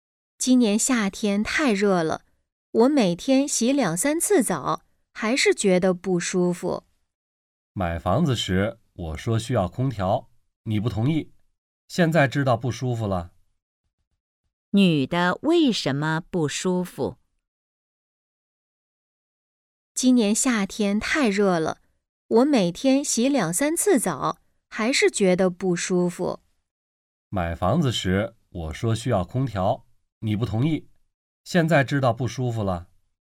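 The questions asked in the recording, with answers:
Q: 女的为什么不舒服?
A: 天太热,家里没有空调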